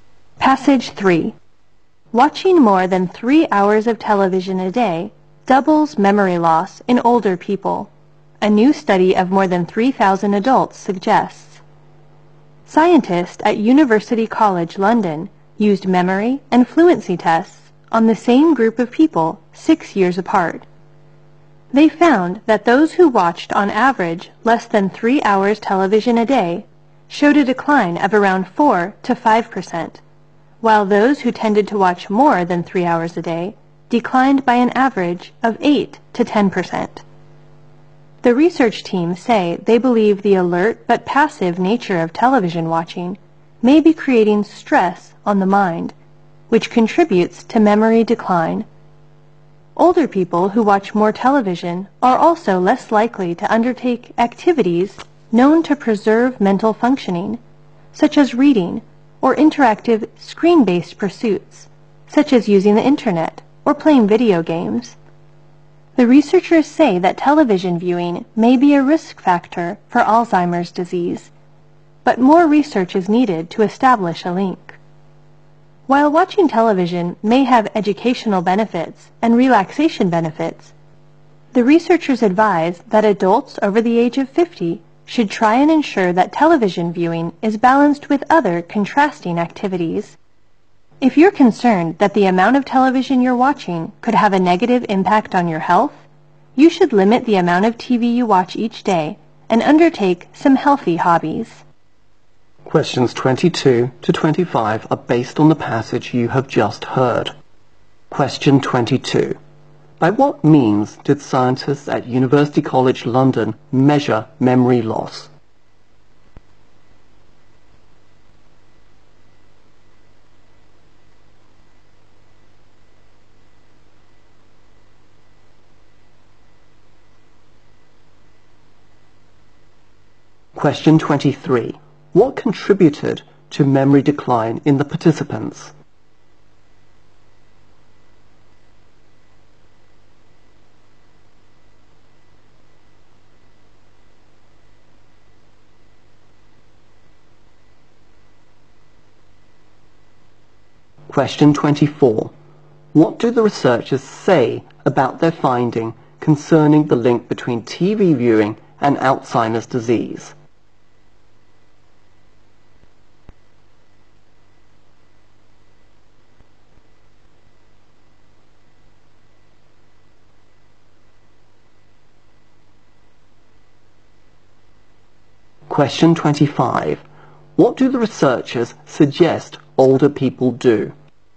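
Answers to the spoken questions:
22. Memory and fluency tests 6 years apart
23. Stress on the mind from the alert but passive nature of TV watching
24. More research is needed to establish a link
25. Balance TV viewing with other contrasting activities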